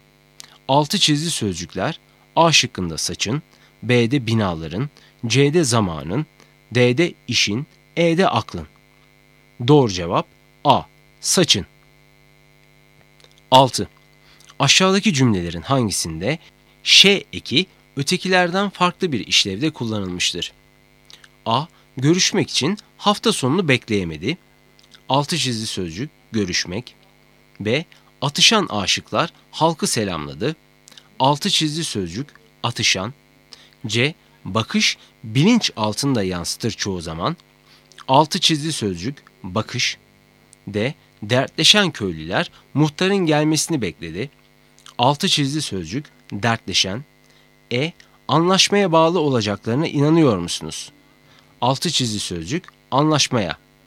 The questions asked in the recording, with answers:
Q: Aşağıdaki cümlelerin hangisinde ş eki ötekilerden farklı bir işlevde kullanılmıştır?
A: Doğru cevap C. Bakış bilinç altında yansıtır çoğu zaman.